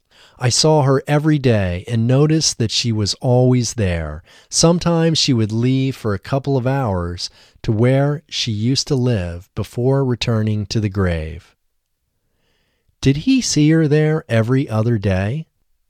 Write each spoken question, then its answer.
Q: Did he see her there every other day?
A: No, he didn't see her there every other day.